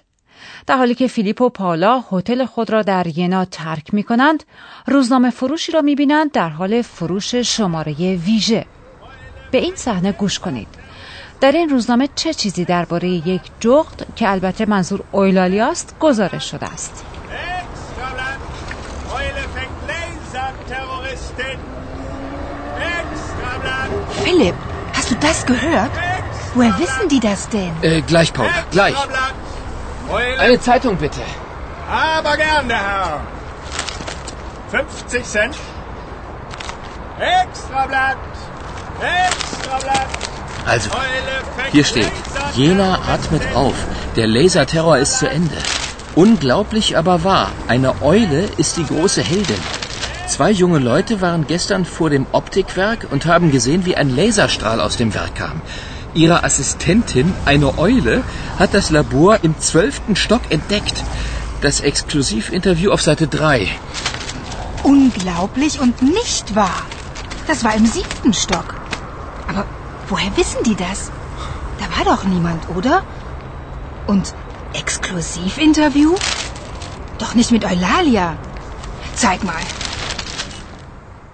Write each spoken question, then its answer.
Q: در این روزنامه چه چیزی درباره یک جغد که البته منظور اویلالیاست گزارش شده است.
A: در شماره ویژه که فیلیپ خریده است آمده که جغدی با دو فرد جوان همکاری داشته و موفق به کشف آزمایشگاه در طبقه دوازدهم شده است.